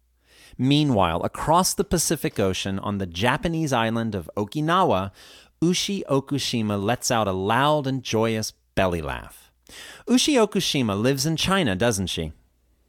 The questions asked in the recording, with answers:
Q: Ushi Okushima lives in China, doesn't she?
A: No, she doesn't. She lives in Okinawa.